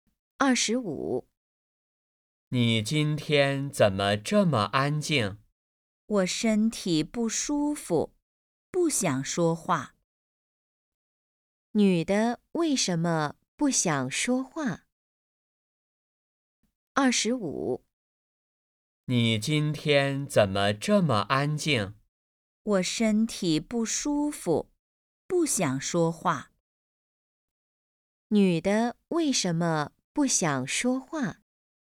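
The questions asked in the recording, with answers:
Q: 女的为什么不想说话?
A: 身体不舒服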